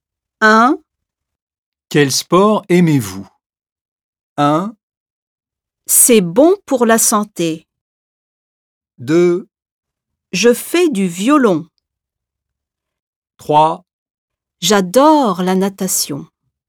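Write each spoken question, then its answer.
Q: Quel sport aimez-vous?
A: 3: J'adore la natation.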